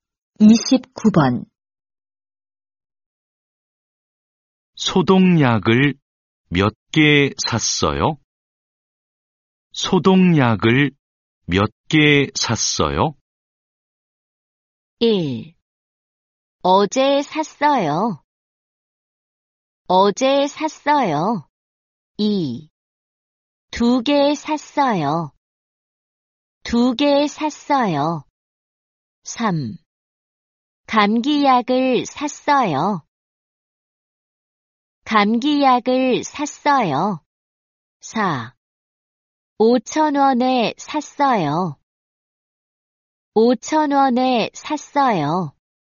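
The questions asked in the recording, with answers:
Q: 소독약을몇개샀어요?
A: 2: 두개샀어요。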